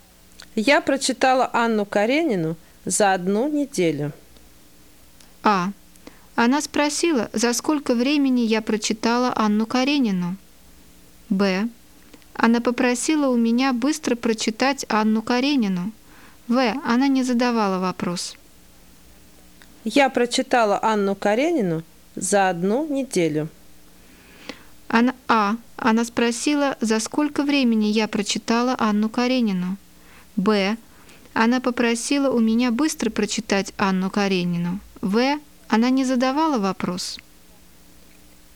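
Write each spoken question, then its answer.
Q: Я прочитала «Анну Каренину» за одну неделю.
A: В: Она не задавала вопрос.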